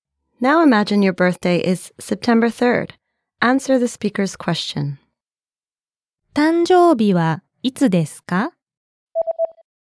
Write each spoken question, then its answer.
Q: 誕生日はいつですか?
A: 9月3日です。